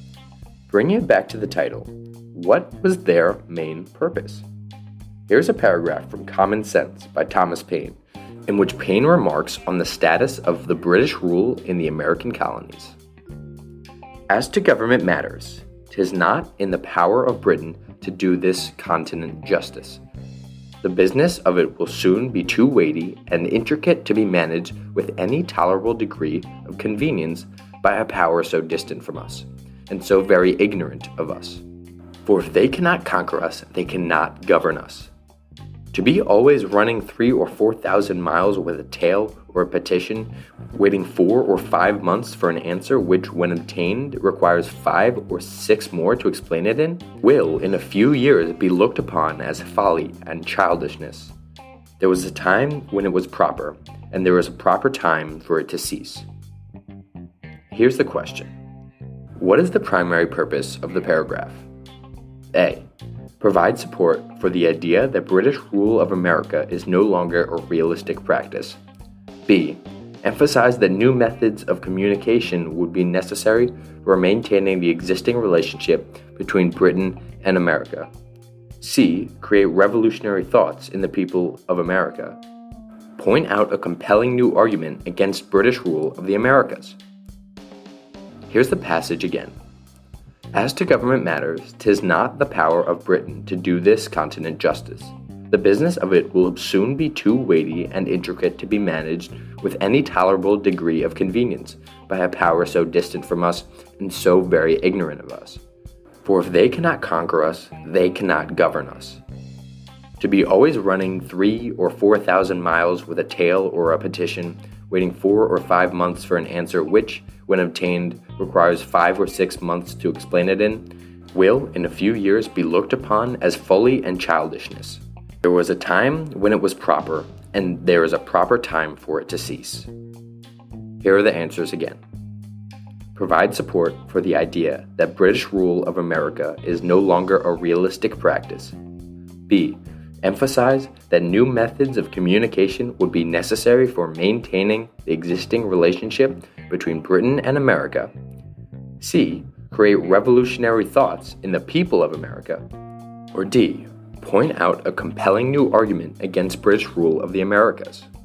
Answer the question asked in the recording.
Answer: Therefore, answer choice A is correct, as it actually gives Paine's stance on the issue, which is that British rule of America is no longer a realistic practice.